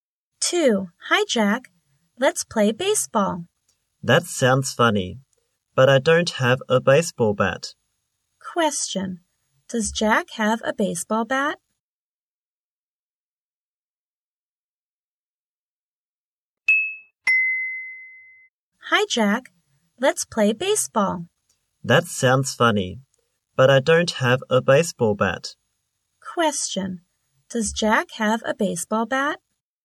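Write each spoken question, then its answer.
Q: Does Jack have a baseball bat?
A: No, he doesn't.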